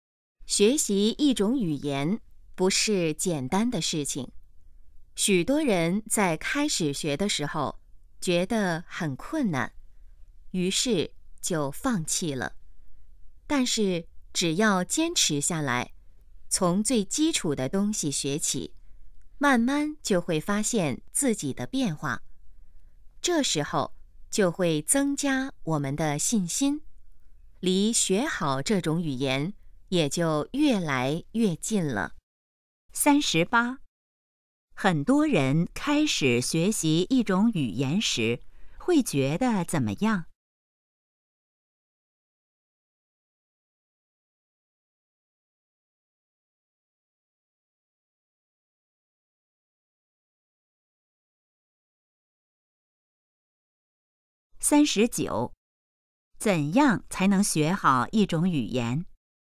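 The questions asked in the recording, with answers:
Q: 很多人开始学习一种语言时,会觉得怎么样?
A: 很困难

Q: 怎样才能学好一种语言?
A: 坚持,从基础学起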